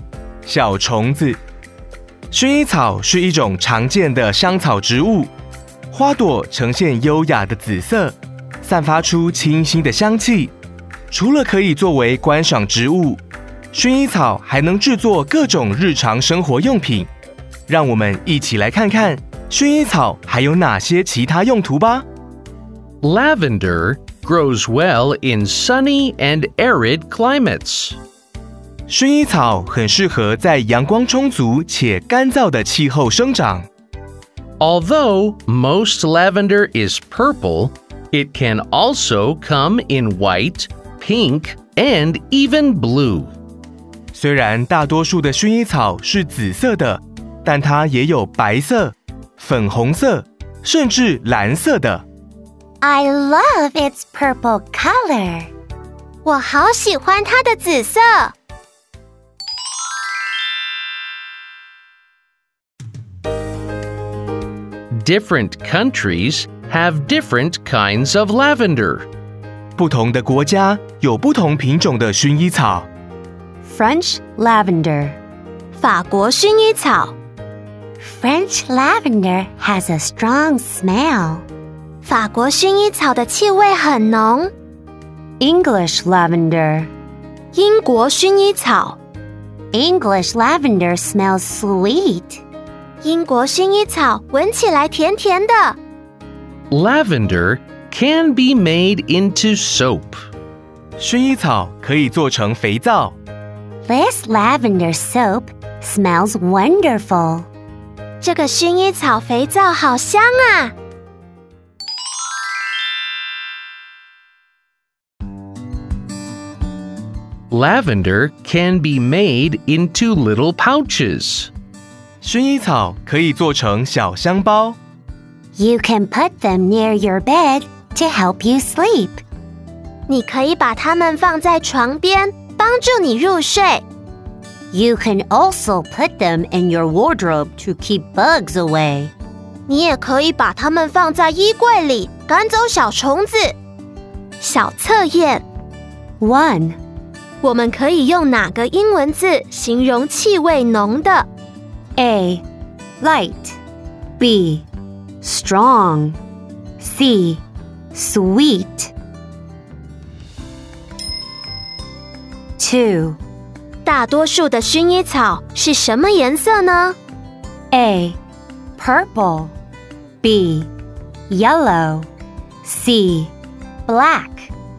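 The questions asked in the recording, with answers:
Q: 我们可以用哪个英文字形容气味浓的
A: B: Strong

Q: 大多数的薰衣草是什么颜色呢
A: A: Purple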